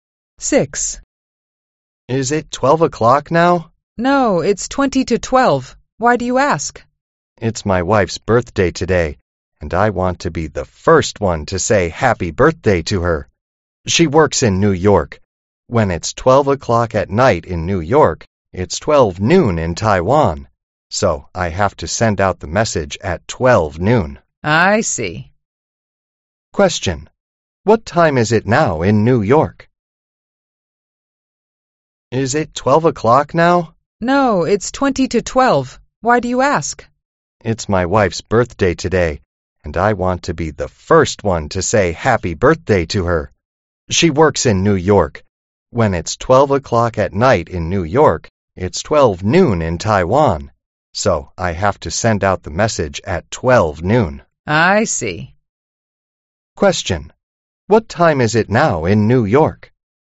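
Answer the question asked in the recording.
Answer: 11:40 at night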